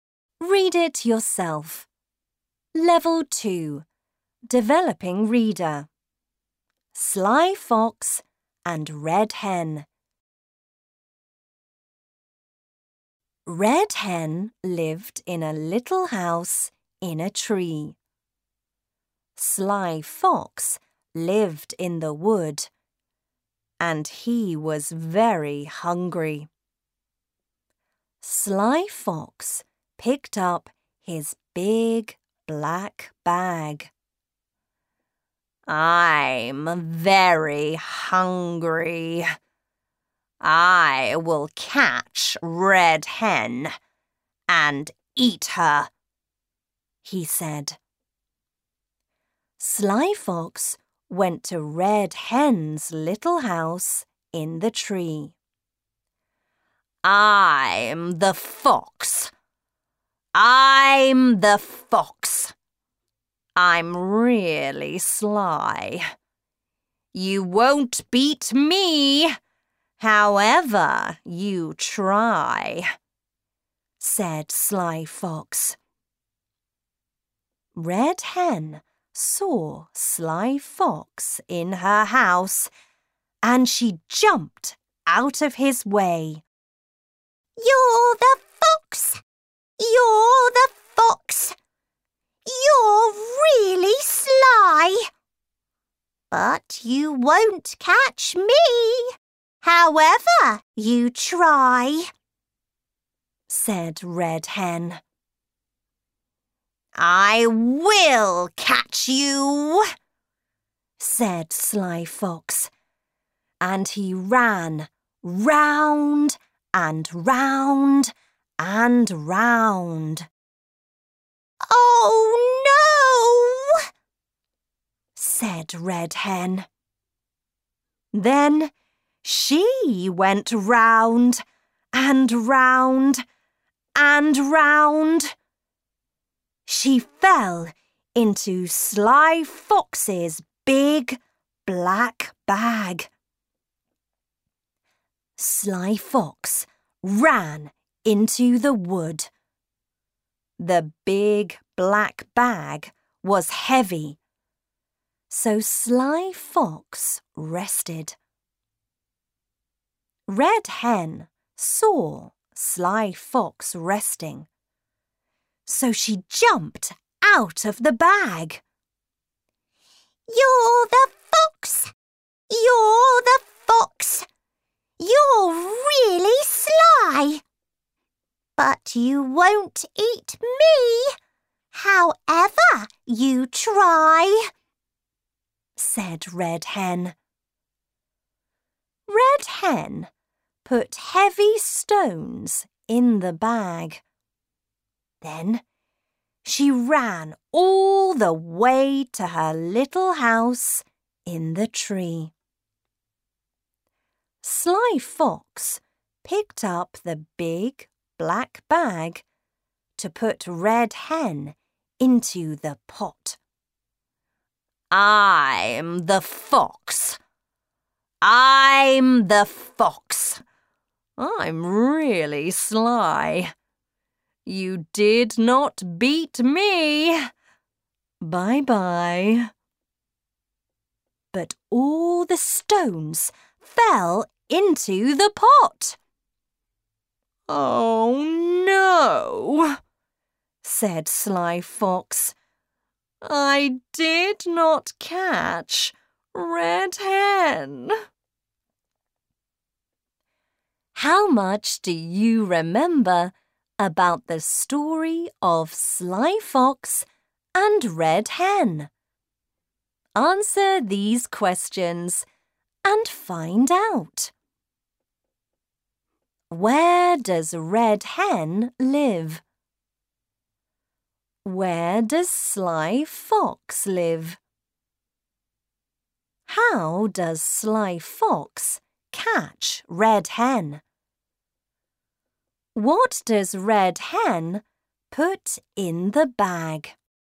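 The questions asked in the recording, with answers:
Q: Where does Red Hen live?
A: In a little house in a tree

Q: Where does Sly Fox live?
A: In the wood

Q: What does Red Hen put in the bag?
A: Heavy stones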